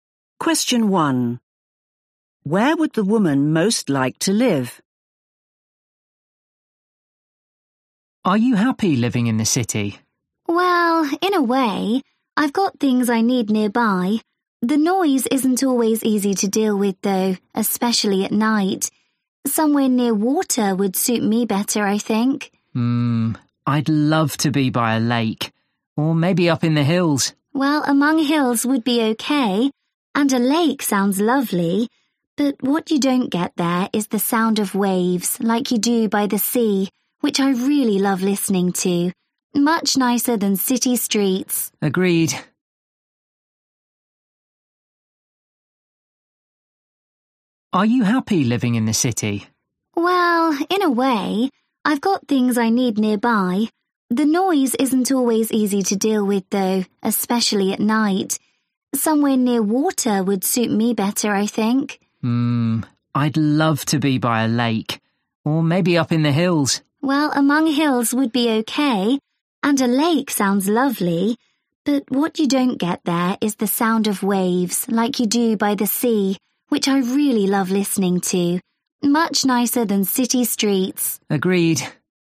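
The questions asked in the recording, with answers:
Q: Where would the woman most like to live?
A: by the sea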